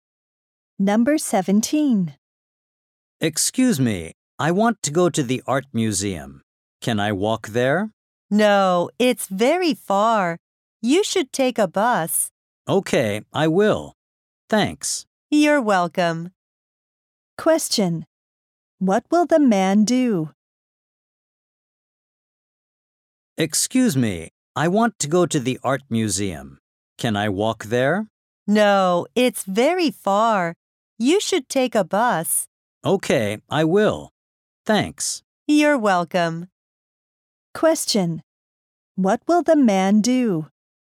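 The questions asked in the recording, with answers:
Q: What will the man do?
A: Take a bus to the art museum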